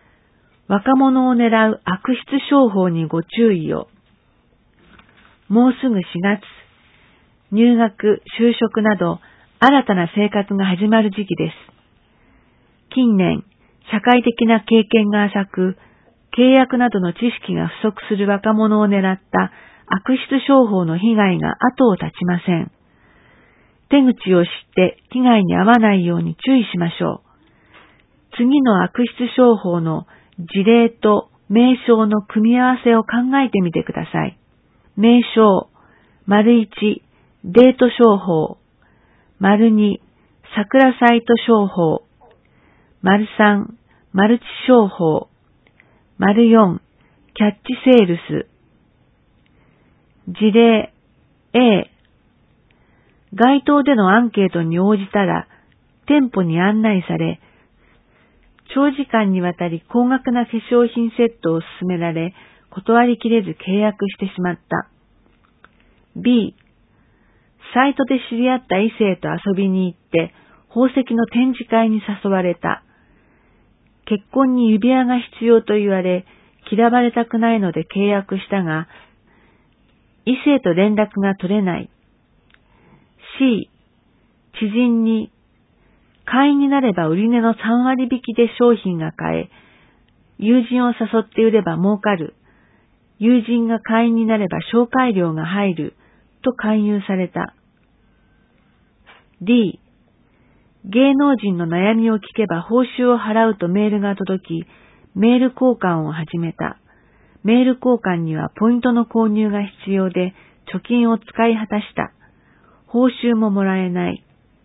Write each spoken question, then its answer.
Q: 事例 A、街頭でのアンケートに応じたら、店舗に案内され、長時間にわたり高額な化粧品セットを勧められ、断りきれず契約してしまった。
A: A.4

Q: B、サイトで知り合った異性と遊びに行って、宝石の展示会に誘われた。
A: B.1

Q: C、知人に、会員になれば売り値の3割引きで商品が買え、友人を誘って売れば儲かる、友人が会員になれば紹介料が入る、と勧誘された。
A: C.3

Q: D、芸能人の悩みを聞けば報酬を払うとメールが届き、メール交換を始めた。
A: D.2